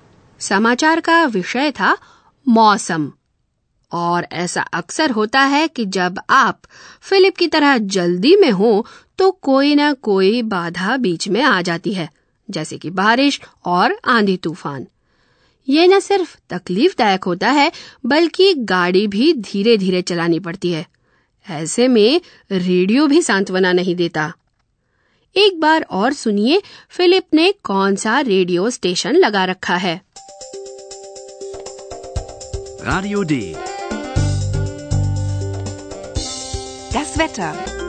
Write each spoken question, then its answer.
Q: एक बार और सुनिए Philip ने कौन सा radio station लगा रखा है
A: ये था radio डे